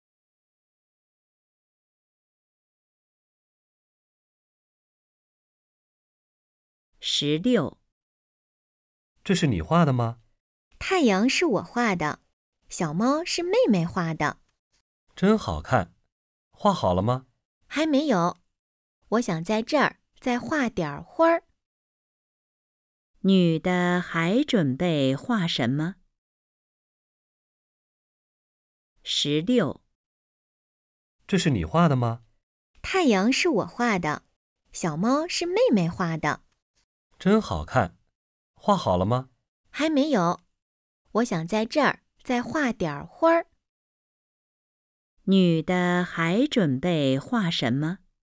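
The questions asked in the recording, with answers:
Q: 女的还准备画什么?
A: 花儿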